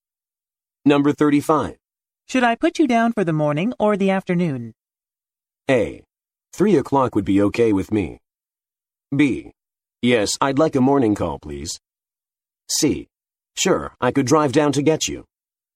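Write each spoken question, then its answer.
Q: Should I put you down for the morning or the afternoon?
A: A: 3:00 would be okay with me.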